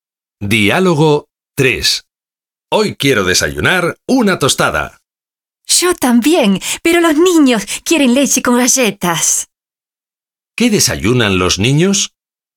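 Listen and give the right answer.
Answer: Leche con galletas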